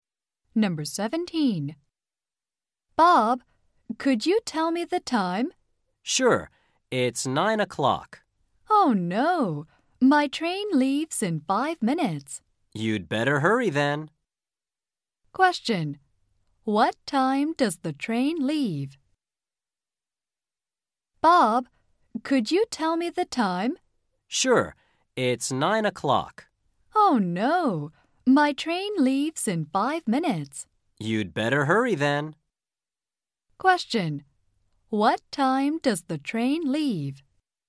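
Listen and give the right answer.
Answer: At 9:05 (five past nine)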